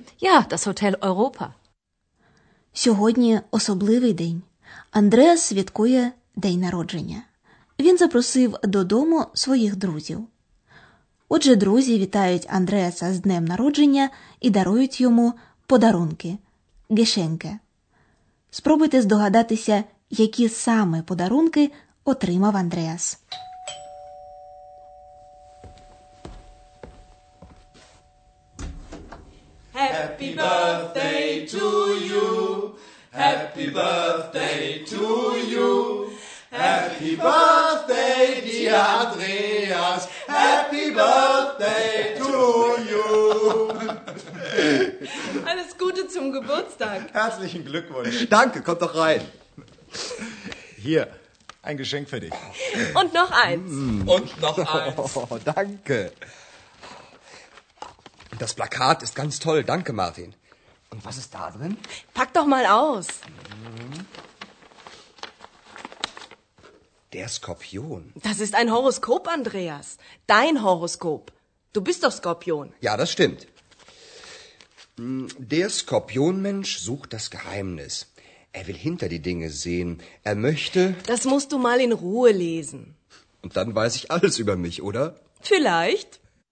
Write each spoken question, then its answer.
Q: Спробуйте здогадатися, які саме подарунки отримав Андреас.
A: Andreas розгортає два подарунки: плакат і гороскоп, який для нього склала одна з гостей.